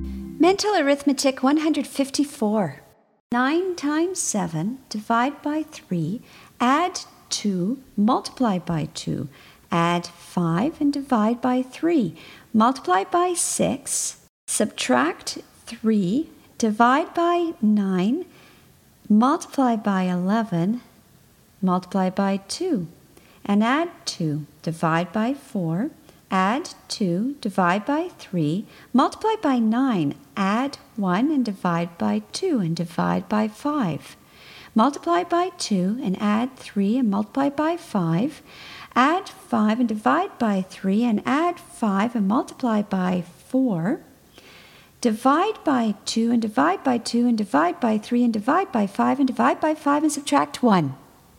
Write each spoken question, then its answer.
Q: 9 times 7, divide by 3, add 2, multiply by 2, add 5 and divide by 3, multiply by 6, subtract 3, divide by 9, multiply by 11, multiply by 2, and add 2, divide by 4, add 2, divide by 3, multiply by 9, add 1 and divide by 2 and divide by 5. Multiply by 2 and add 3 and multiply by 5. Add 5 and divide by 3 and add 5 and multiply by 4. Divide by 2 and divide by 2 and divide by 3 and divide by 5 and divide by 5 and subtract 1.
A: And the answer is 0.